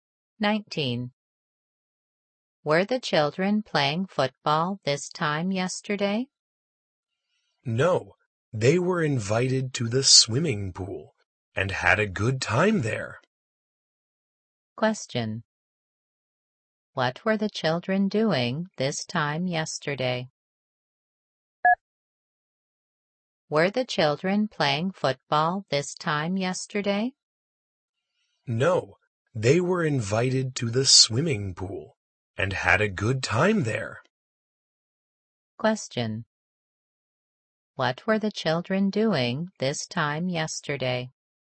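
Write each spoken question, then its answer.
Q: What were the children doing this time yesterday?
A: Swimming at the swimming pool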